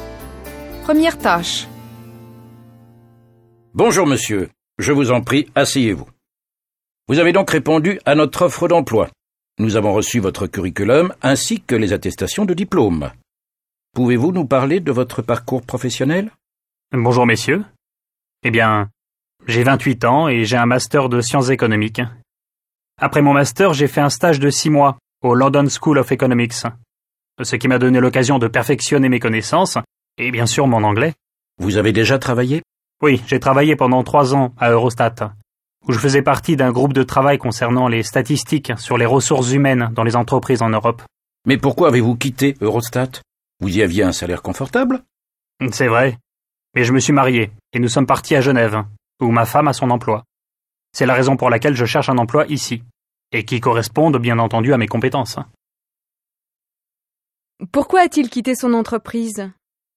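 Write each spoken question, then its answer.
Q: Pourquoi a-t-il quitté son entreprise ?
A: Parce qu'il s'est marié et est parti à Genève, où sa femme travaille.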